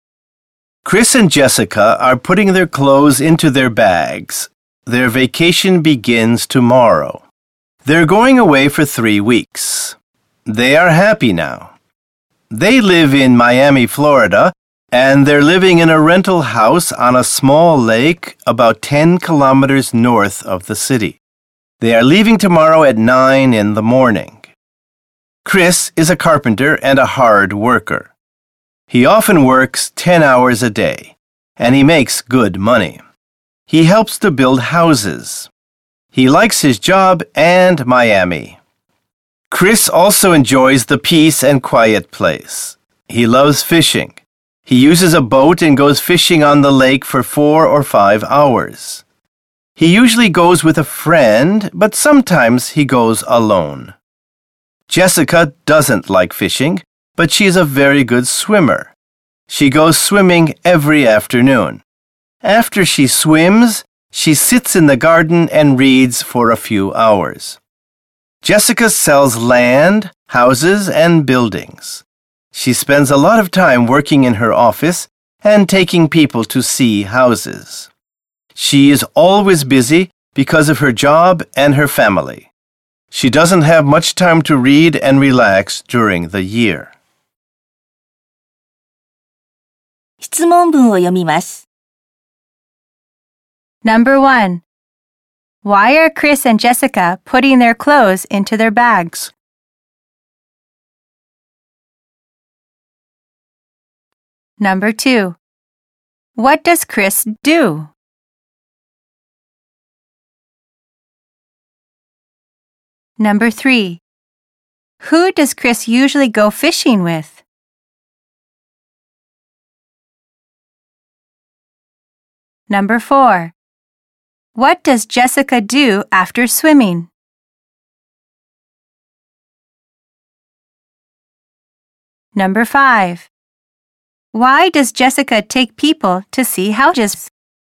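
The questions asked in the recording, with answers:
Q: Why are Chris and Jessica putting their clothes into their bags?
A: Because their vacation begins tomorrow.

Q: What does Chris do?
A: He is a carpenter.

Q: Who does Chris usually go fishing with?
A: With a friend.

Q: What does Jessica do after swimming?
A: She sits in the garden and reads.

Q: Why does Jessica take people to see houses?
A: Because she sells land, houses, and buildings.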